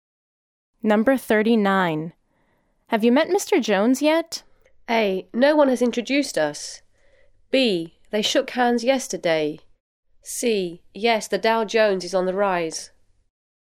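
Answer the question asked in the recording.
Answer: A: No one has introduced us.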